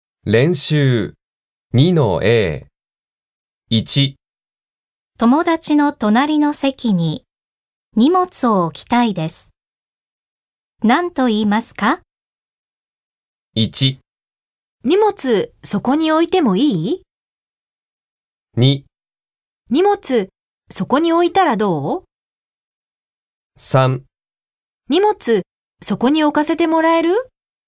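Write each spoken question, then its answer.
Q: 友達の隣の席に荷物を置きたいです。何と言いますか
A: 3: 荷物そこに置かせてもらえる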